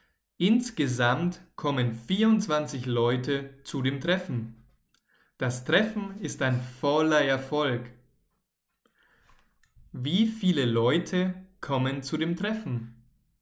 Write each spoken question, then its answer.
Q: Wie viele Leute kommen zu dem Treffen?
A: 24. 24 Leute kommen zu dem Klassentreffen.